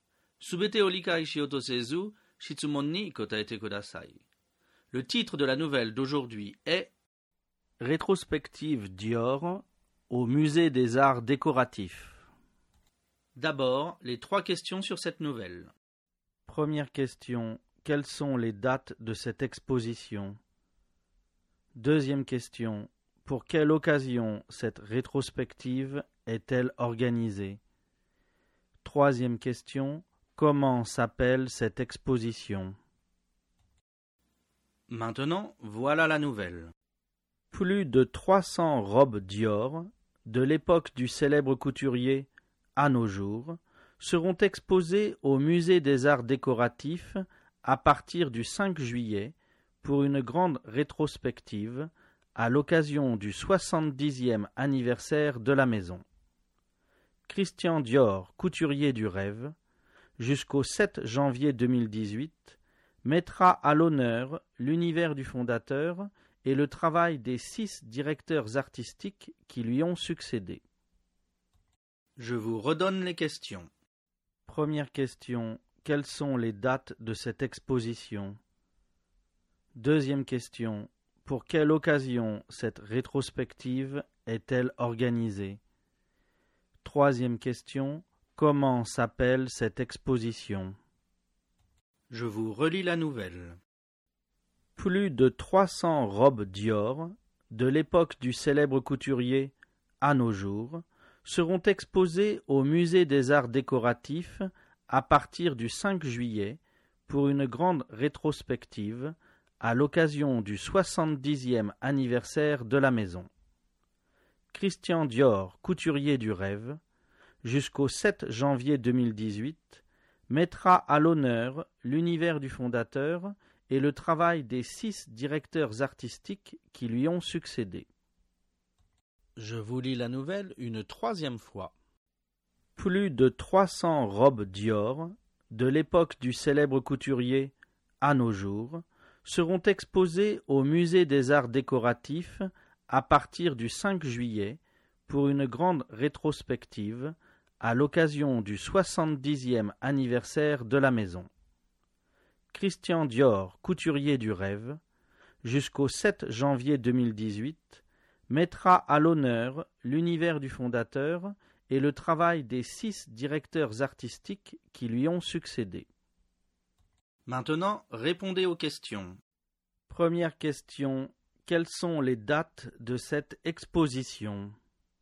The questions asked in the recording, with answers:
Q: Première question, quelles sont les dates de cette exposition?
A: Réponse, l'exposition se tient du 5 juillet 2017 au 7 janvier 2018.

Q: Deuxième question. Pour quelle occasion cette rétrospective est-elle organisée?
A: Réponse. Cette rétrospective est organisé pour le 70e anniversaire de la maison Dior.

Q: Troisième question, comment s'appelle cette exposition?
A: Réponse, cette exposition s'appelle Christian Dior, couturier du rêve.